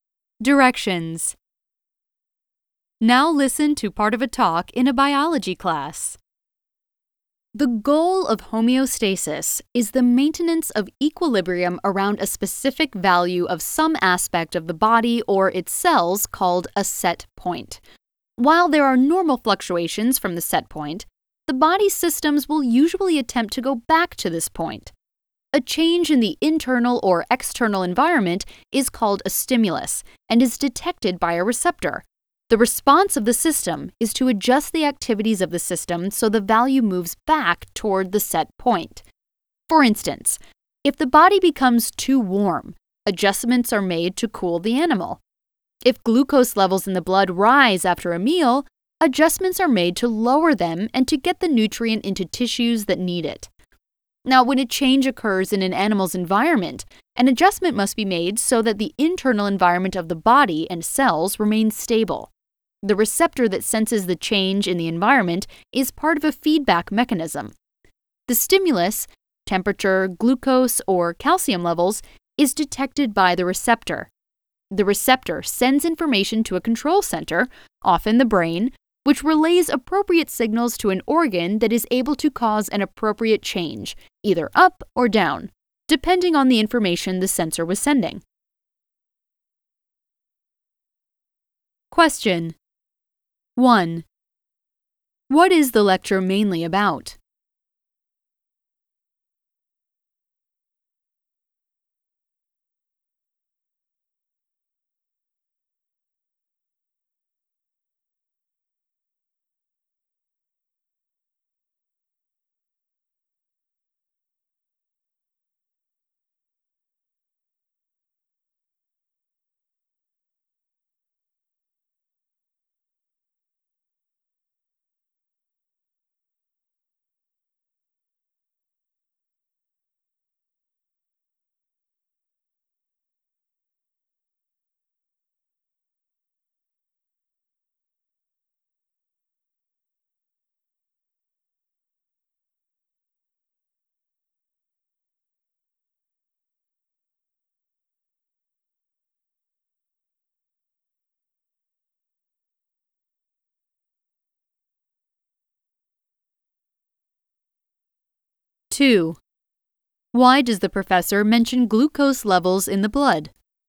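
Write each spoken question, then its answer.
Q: What is the lecture mainly about?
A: Homeostasis: how the body keeps itself stable around a set point

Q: Why does the professor mention glucose levels in the blood?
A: As an example of the body adjusting a value back toward its set point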